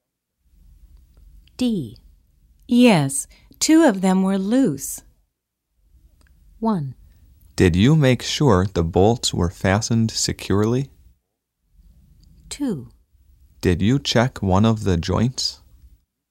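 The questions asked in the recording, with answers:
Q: Yes, two of them were loose.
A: 1: Did you make sure the bolts were fastened securely?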